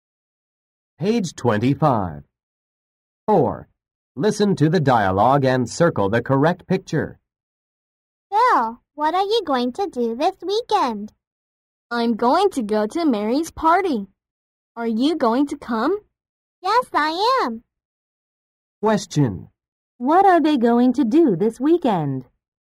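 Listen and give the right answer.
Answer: Go to Mary's party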